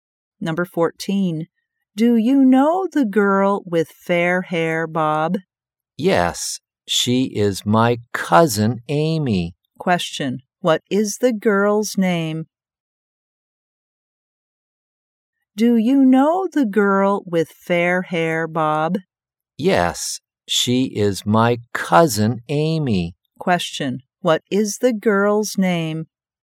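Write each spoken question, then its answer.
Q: What is the girl's name?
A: Amy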